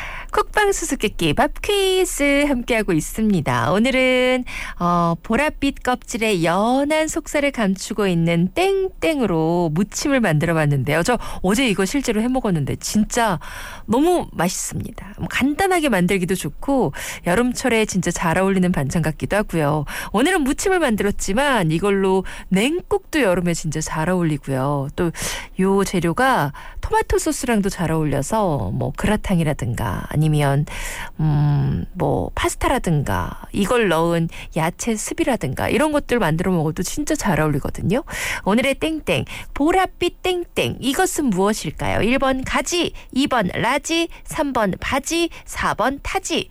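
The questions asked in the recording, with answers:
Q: 오늘의 땡땡 보랏빛 땡땡 이것은 무엇일까요? 1번 가지, 2번 라지, 3번 바지, 4번 타지.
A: 1: 가지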